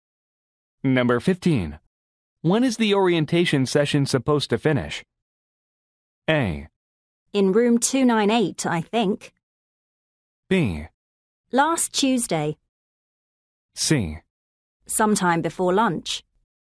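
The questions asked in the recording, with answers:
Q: When is the orientation session supposed to finish?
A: C: Sometime before lunch.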